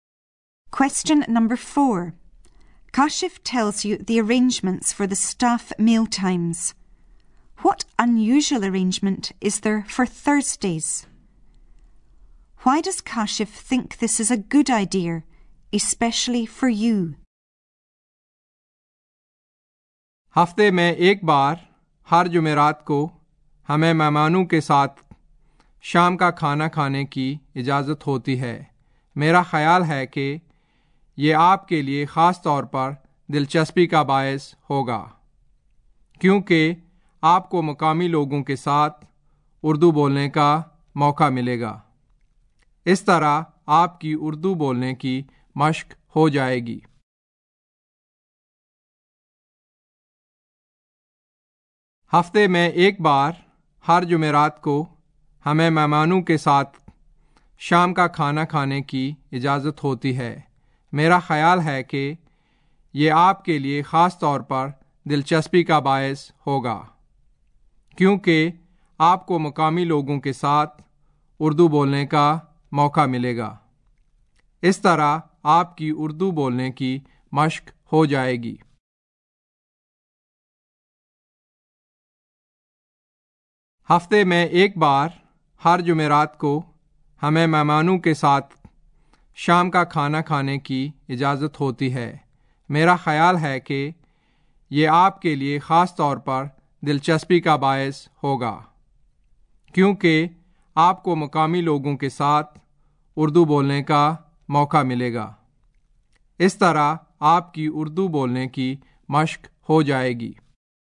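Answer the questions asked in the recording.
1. Staff may eat evening meal with the guests
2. You get a chance to speak Urdu with local people and practise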